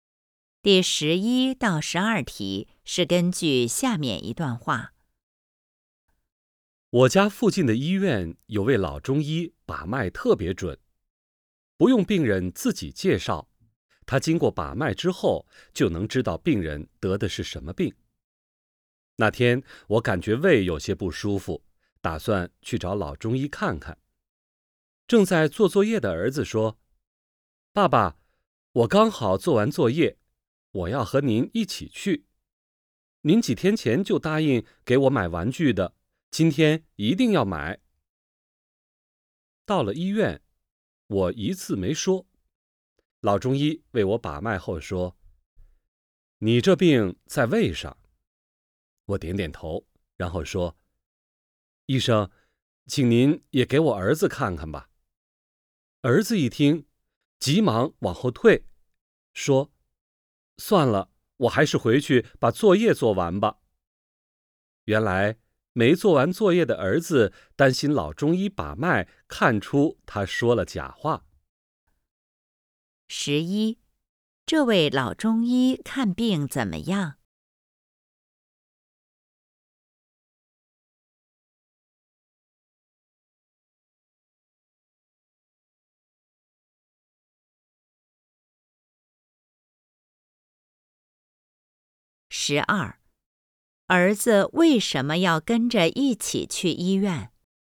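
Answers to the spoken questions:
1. 把脉特别准
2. 想让爸爸给他买玩具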